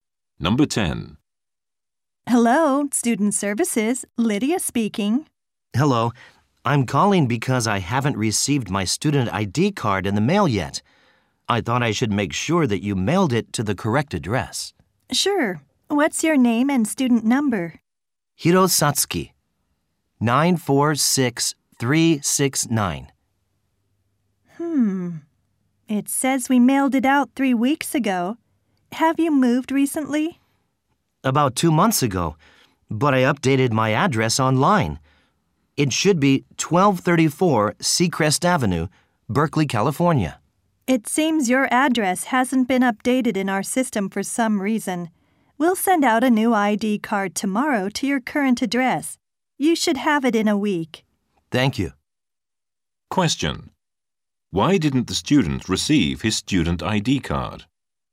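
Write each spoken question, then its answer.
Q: Why didn't the student receive his student ID card?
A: His address wasn't updated in the system, so it went to his old address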